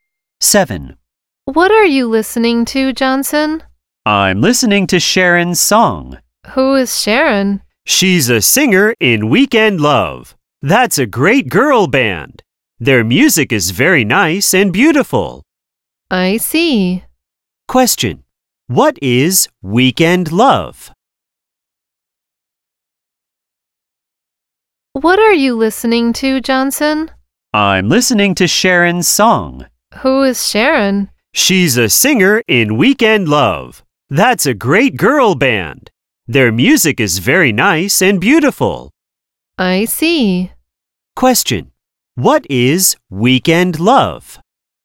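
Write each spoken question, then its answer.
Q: What is Weekend Love?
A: A girl band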